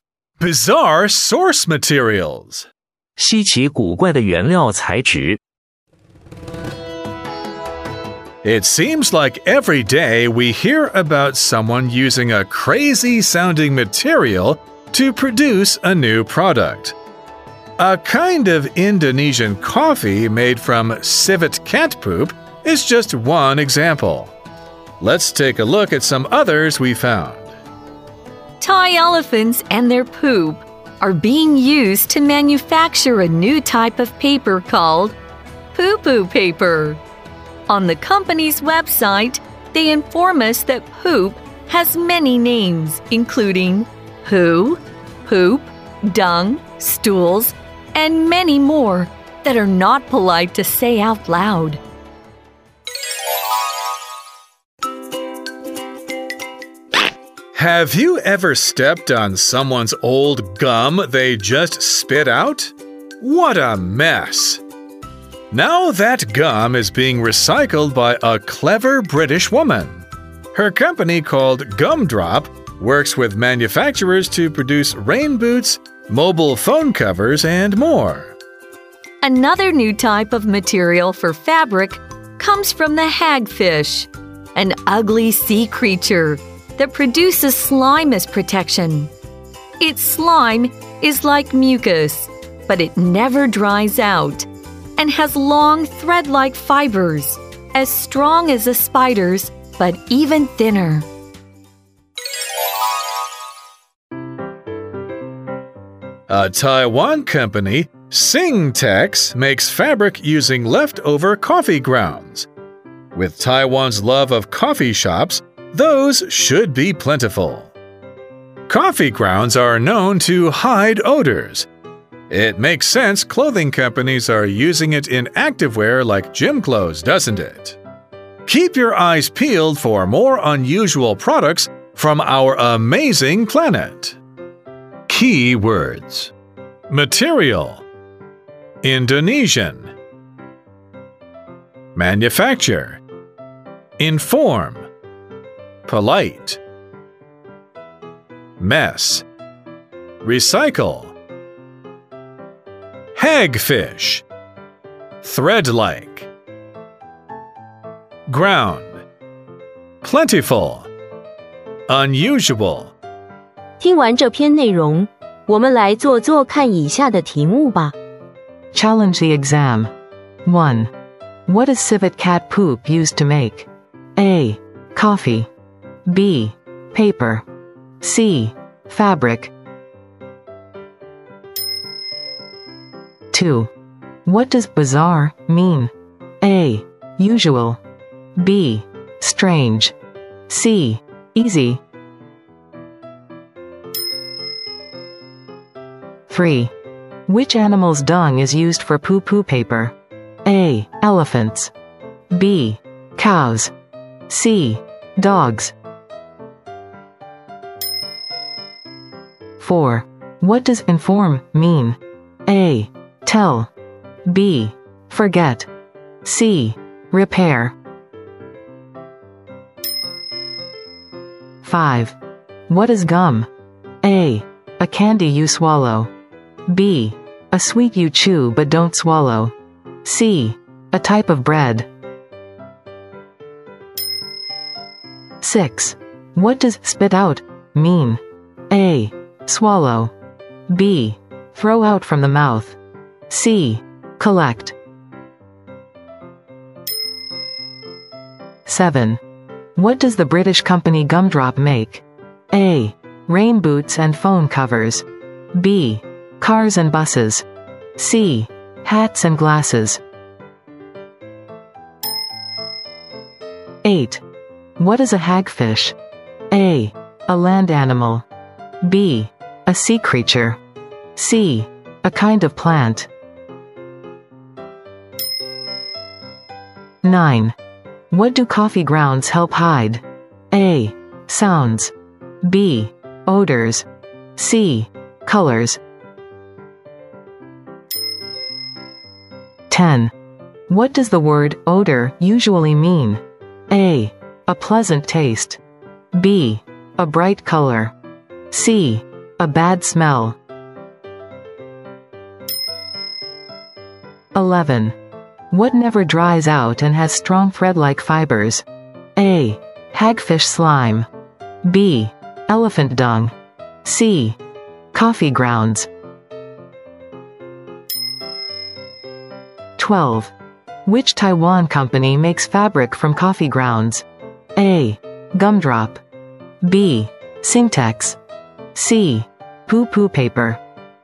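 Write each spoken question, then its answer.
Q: What is civet cat poop used to make?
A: A: Coffee.

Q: What does bizarre mean?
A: B: Strange.

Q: Which animal's dung is used for poo-poo paper?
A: A: Elephants.

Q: What does inform mean?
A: A: Tell.

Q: What is gum?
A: B: A sweet you chew but don't swallow.

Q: What does spit out mean?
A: B: Throw out from the mouth.

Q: What does the British company Gumdrop make?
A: A: Rain boots and phone covers.

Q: What is a hagfish?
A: B: A sea creature.

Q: What do coffee grounds help hide?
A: B: Odors.

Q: What does the word odor usually mean?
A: C: A bad smell.

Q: What never dries out and has strong thread-like fibers?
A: A: Hagfish slime.

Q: Which Taiwan company makes fabric from coffee grounds?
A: B: Singtex.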